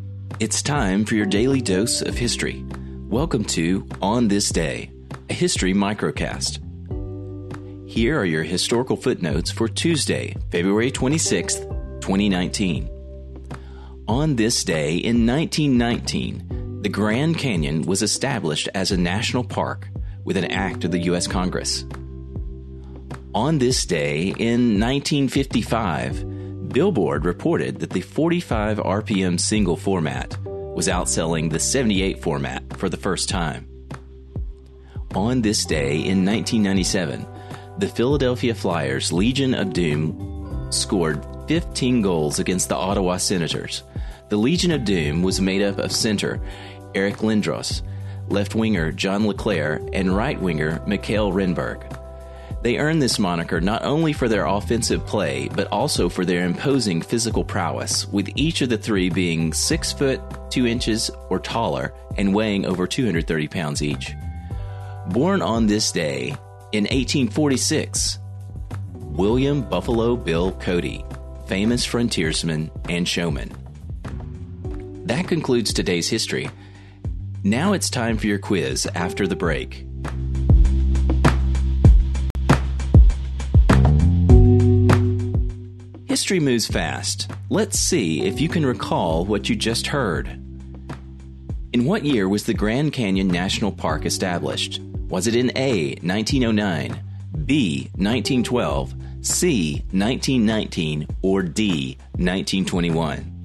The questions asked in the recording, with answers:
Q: In what year was the Grand Canyon National Park established?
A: The answer is C, 1919 was the year the Grand Canyon National Park was established.